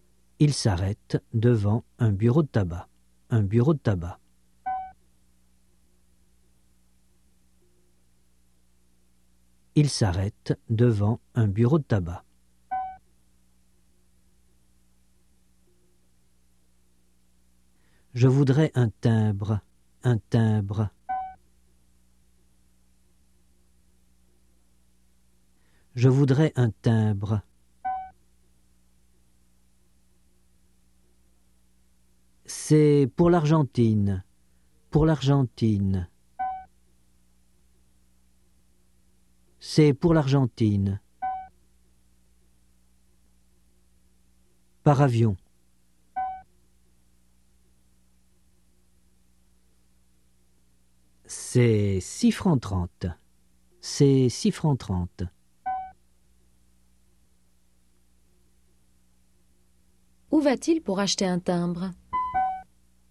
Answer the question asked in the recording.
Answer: Dans un bureau de tabac.